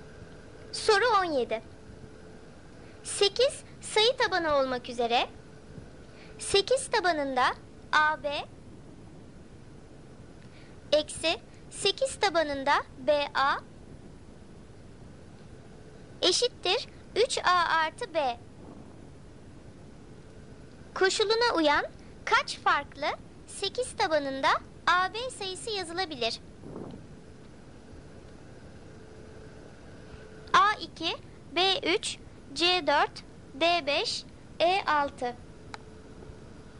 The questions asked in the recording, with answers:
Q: Koşuluna uyan kaç farklı 8 tabanında AB sayısı yazılabilir?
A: Doğru cevap B3.